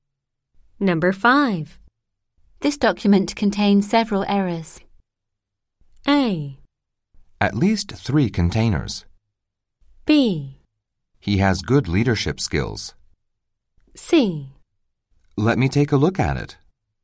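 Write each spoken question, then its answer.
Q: This document contains several errors.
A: C: Let me take a look at it.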